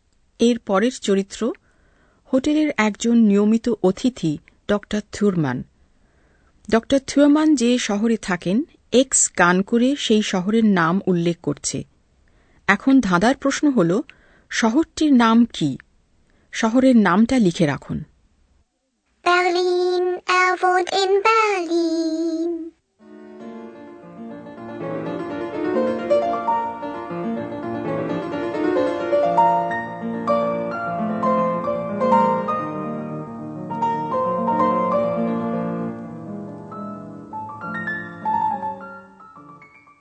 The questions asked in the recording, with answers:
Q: শহরটির নাম কি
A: Berlin শহর